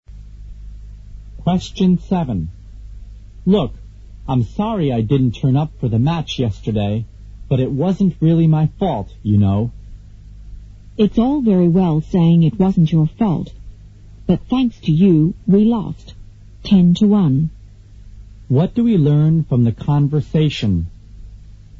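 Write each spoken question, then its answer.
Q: What do we learn from the conversation?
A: The man missed the match and his team lost 10-1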